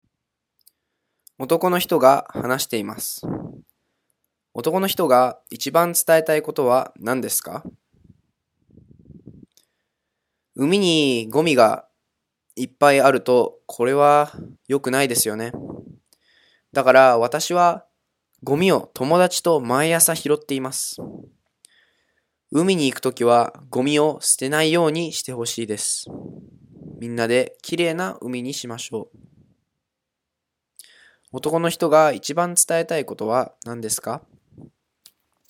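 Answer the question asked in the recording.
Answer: 海に行くときはゴミを捨てないでほしい(みんなで海をきれいにしよう)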